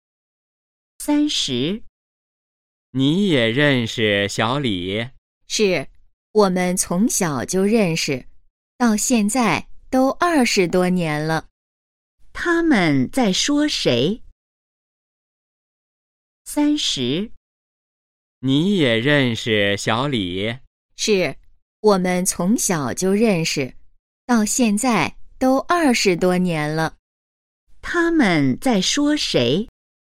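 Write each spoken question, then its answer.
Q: 他们在说谁?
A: 小李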